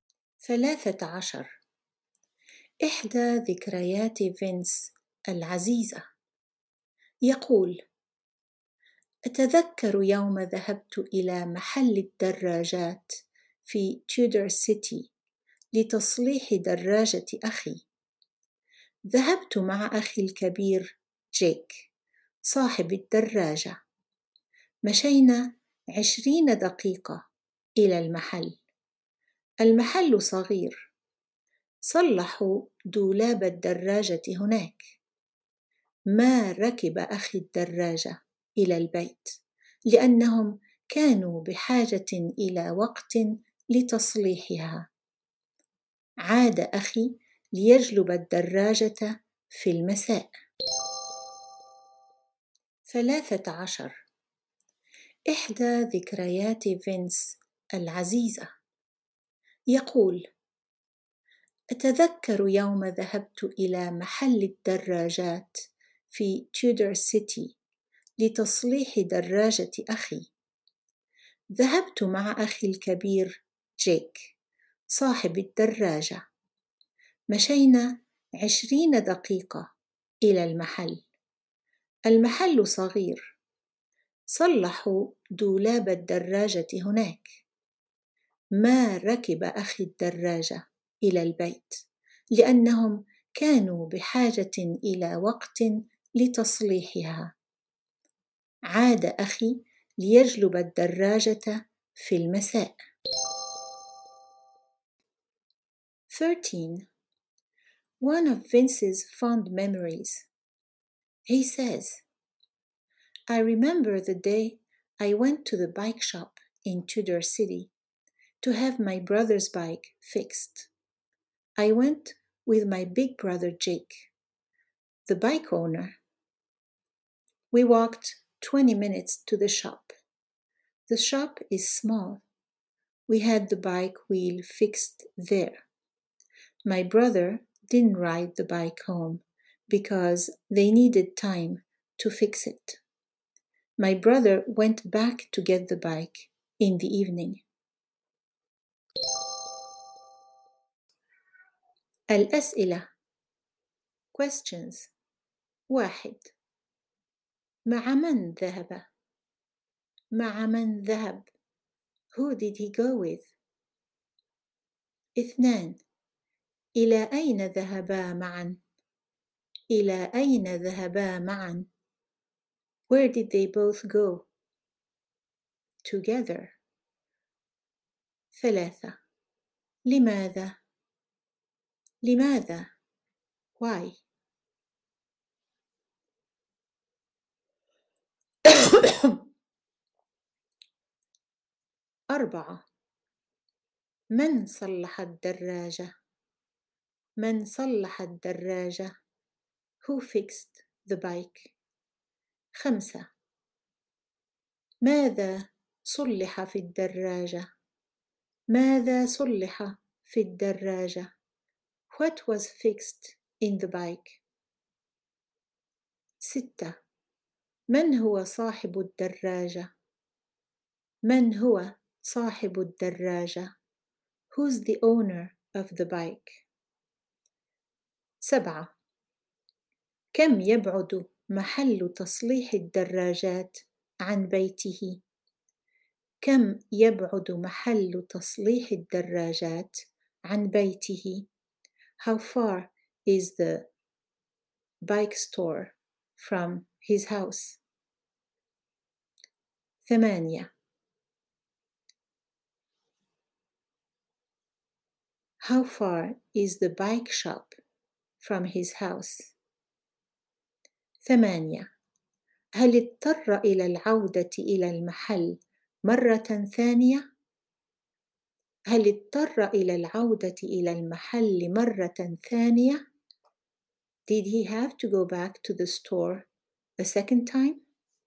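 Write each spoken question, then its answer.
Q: مع من ذهب؟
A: مع أخيه الكبير جيك

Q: إلى أين ذهبا معا؟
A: إلى محل الدراجات في تيودر سيتي

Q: لماذا؟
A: لتصليح دراجة أخيه

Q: من صلح الدراجة؟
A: المحل (العاملون في محل الدراجات)

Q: ماذا صلح في الدراجة؟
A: الدولاب

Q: من هو صاحب الدراجة؟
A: أخوه الكبير جيك

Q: كم يبعد محل تصليح الدراجات عن بيته؟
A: 20 دقيقة مشيًا

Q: هل اضطر إلى العودة إلى المحل مرة ثانية؟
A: لا، أخوه عاد ليجلب الدراجة في المساء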